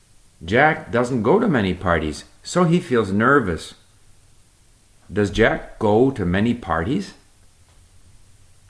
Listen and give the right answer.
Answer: No, Jack doesn't go to many parties, so he feels nervous.